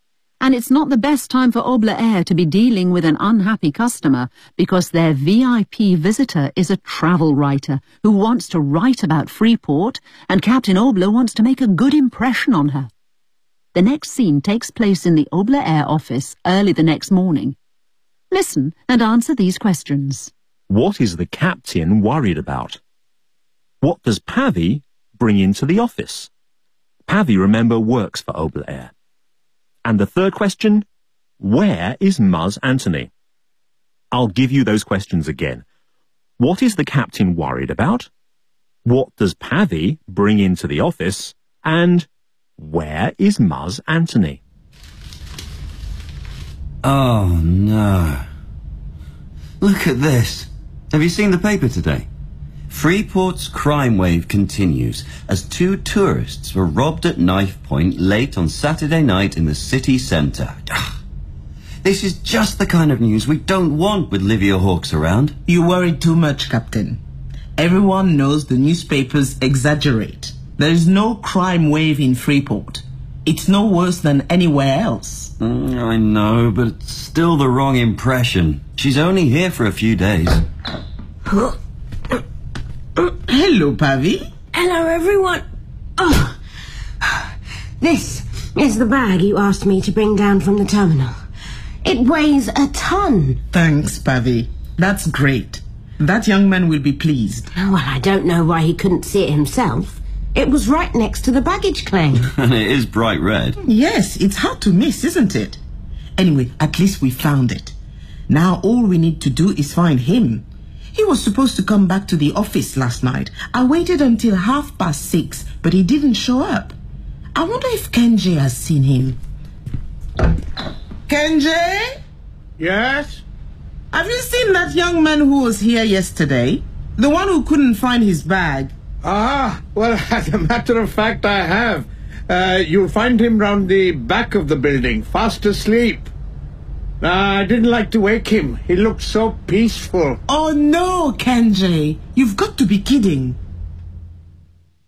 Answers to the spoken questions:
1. A story in the newspaper.
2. She brings Muzz's bag, the bag that he lost yesterday when he arrived in Freeport.
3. He's round the back of the building, fast asleep.